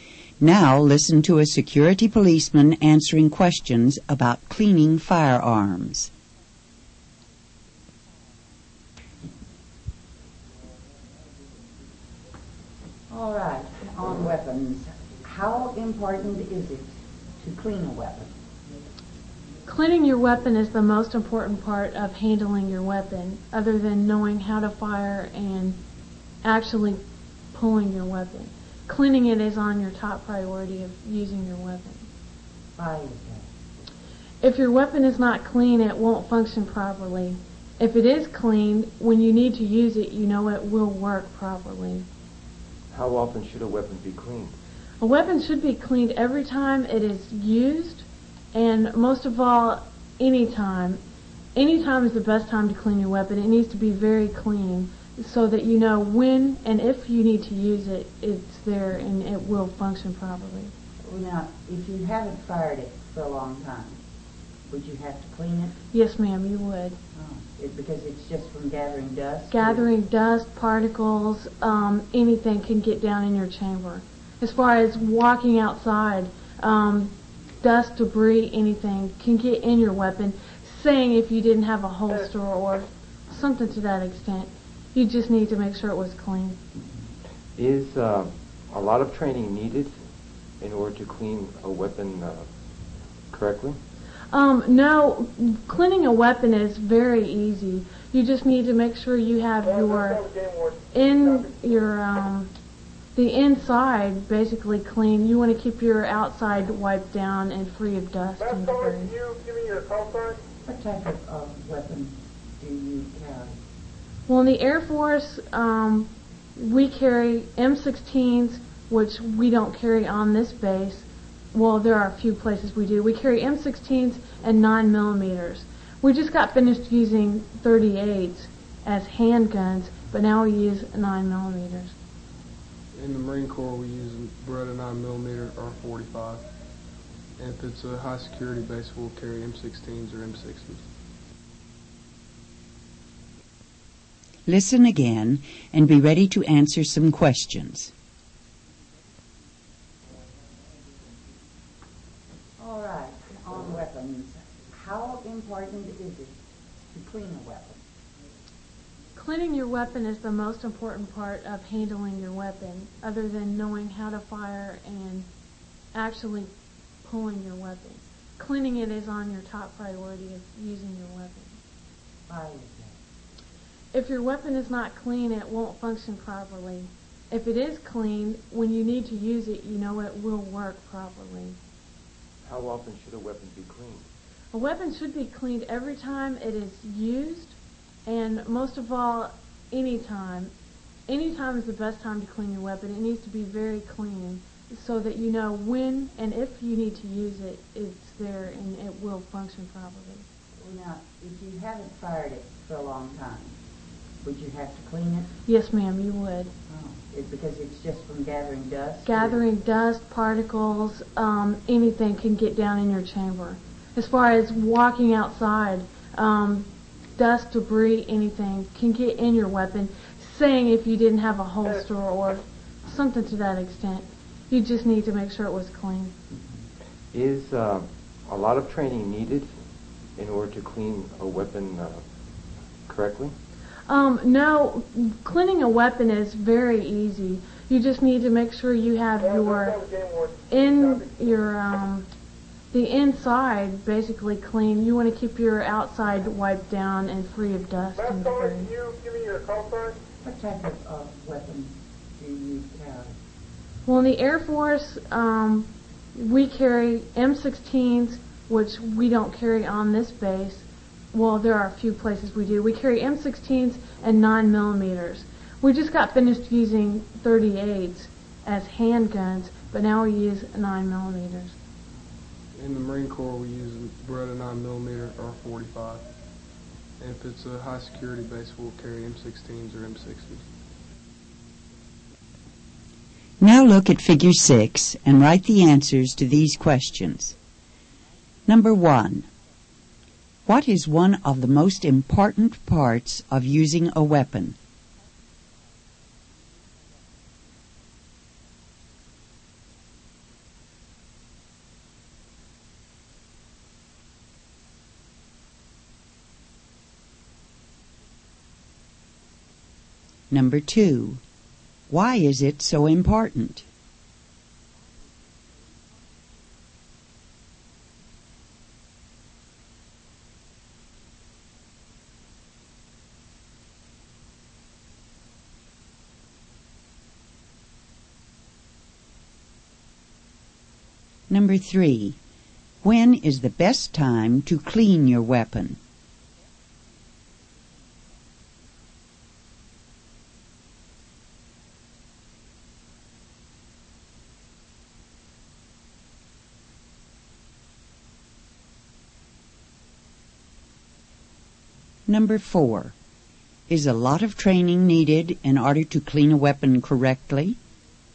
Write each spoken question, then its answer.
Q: What is one of the most important parts of using a weapon?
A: Cleaning the weapon.

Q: Why is it so important?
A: So it will function properly.

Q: When is the best time to clean your weapon?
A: Any time is the best time.

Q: Is a lot of training needed in order to clean a weapon correctly?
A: No, it's very easy.